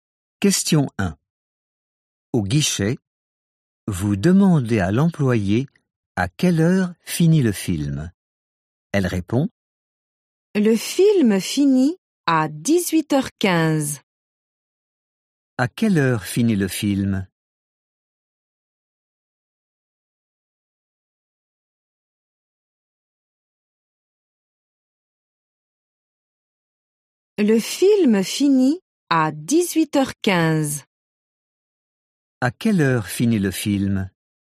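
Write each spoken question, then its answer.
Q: À quelle heure finit le film ?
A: À 18h15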